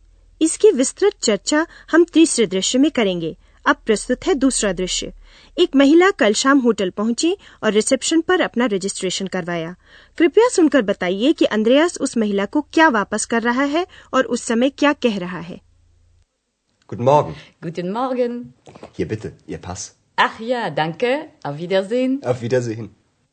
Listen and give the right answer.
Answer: Andreas महिला को उसका passport वापस करता है जिसे कल शाम उसने registration के लिए रख लिया था वह उससे कहता है ये लीजिए आपका passport